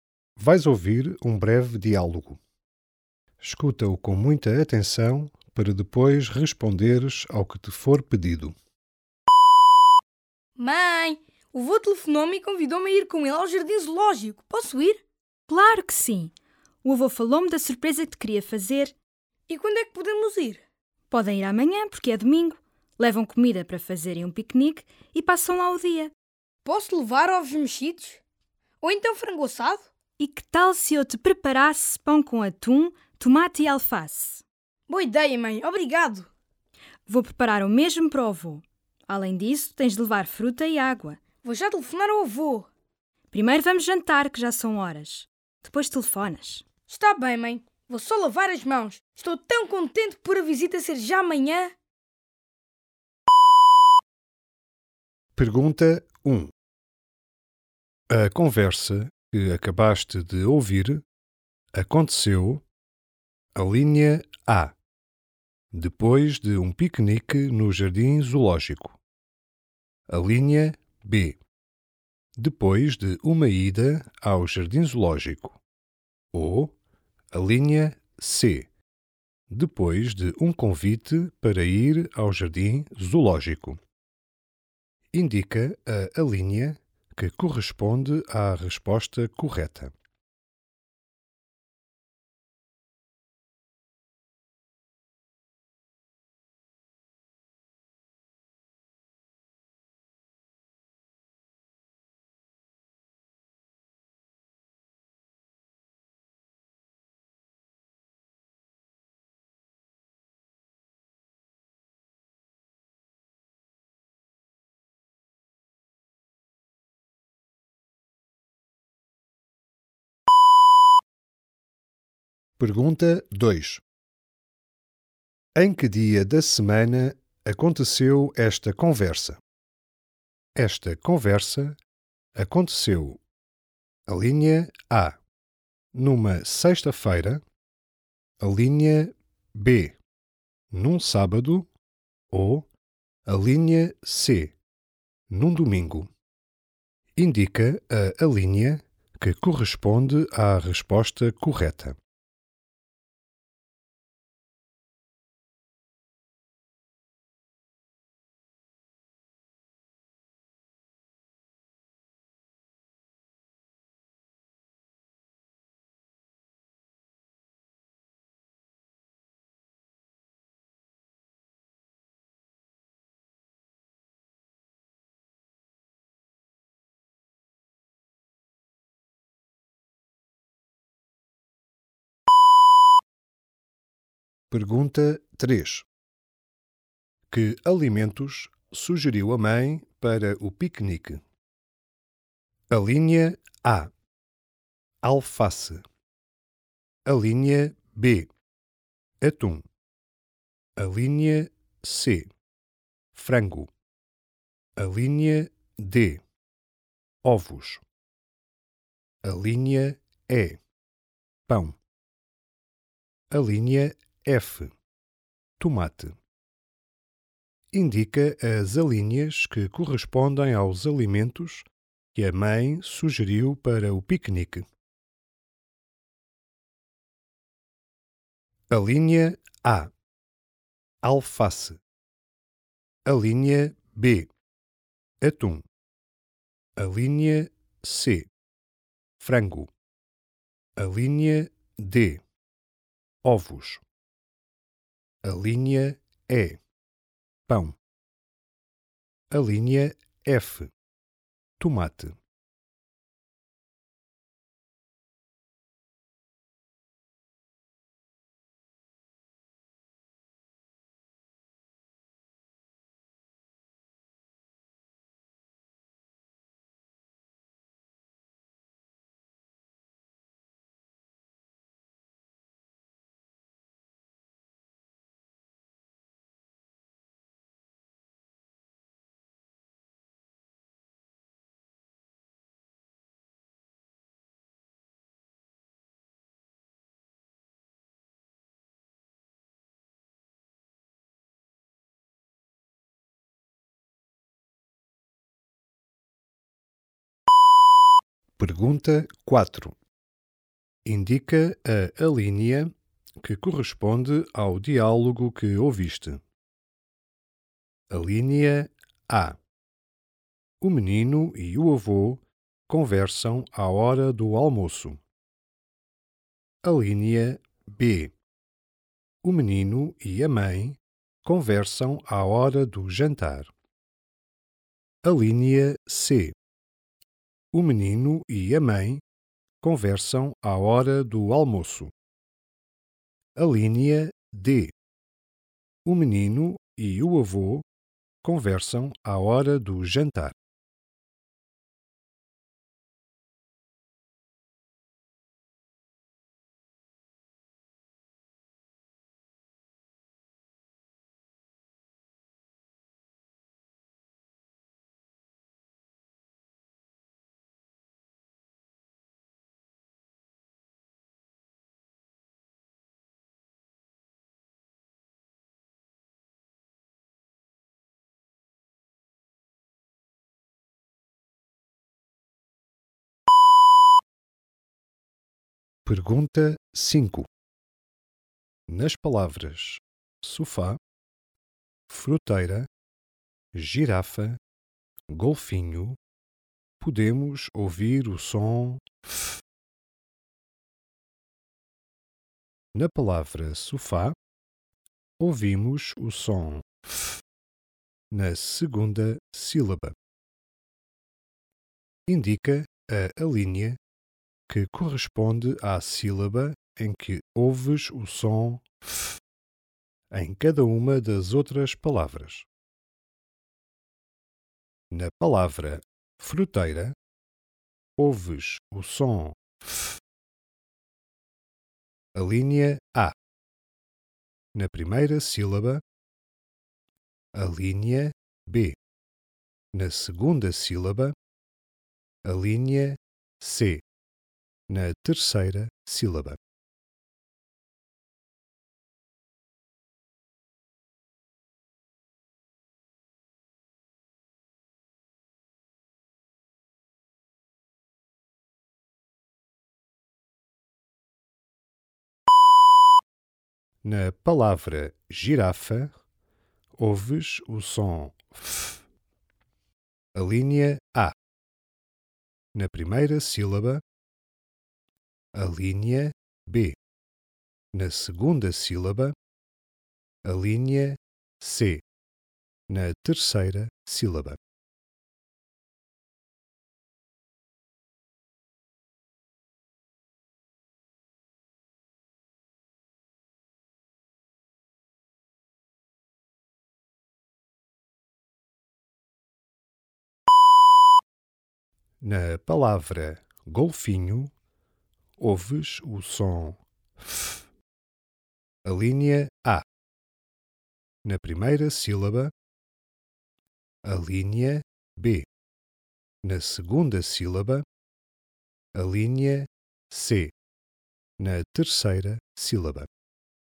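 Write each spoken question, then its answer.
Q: A conversa que acabaste de ouvir aconteceu a linha A, depois de um piquenique no jardim zoológico. A linha B, depois de uma ida ao jardim zoológico. Ou a linha C, depois de um convite para ir ao jardim zoológico.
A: C: depois de um convite para ir ao jardim zoológico

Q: Em que dia da semana aconteceu esta conversa?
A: B: num sábado

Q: Que alimentos sugeriu a mãe para o piquenique?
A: A: alface, B: atum, E: pão, F: tomate

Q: Indica a alínea que corresponde ao diálogo que ouviste.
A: B: O menino e a mãe conversam à hora do jantar.

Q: Na palavra fruteira, ouves o som F.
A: A: Na primeira sílaba

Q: Na palavra girafa, ouves o som F.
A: C: Na terceira sílaba

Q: Na palavra golfinho, ouves o som F.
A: B: Na segunda sílaba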